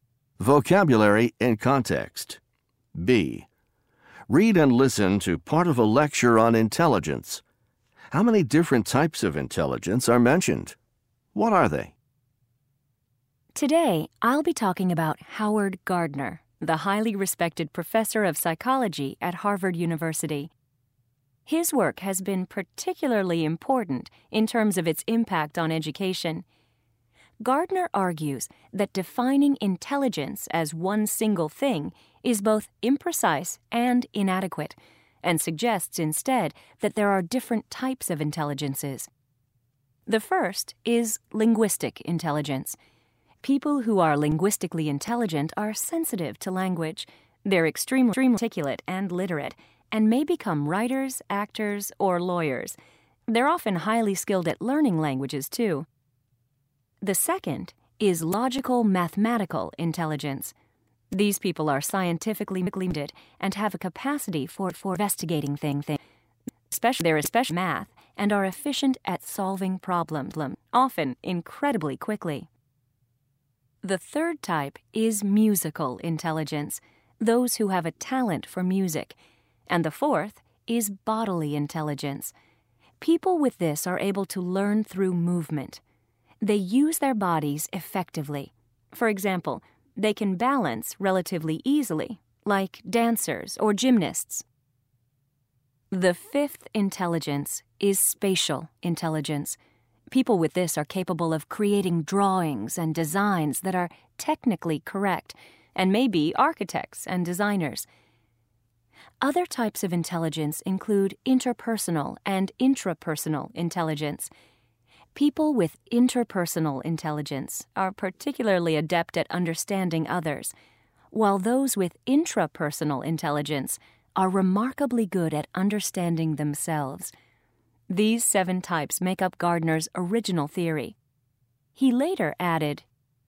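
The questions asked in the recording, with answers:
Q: How many different types of intelligence are mentioned?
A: Seven

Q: What are they?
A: Linguistic, logical-mathematical, musical, bodily, spatial, interpersonal and intrapersonal intelligence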